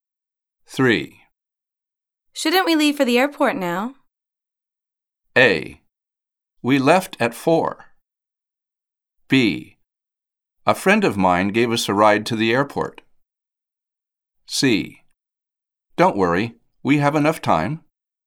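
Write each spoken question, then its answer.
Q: Shouldn't we leave for the airport now?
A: C: Don't worry, we have enough time.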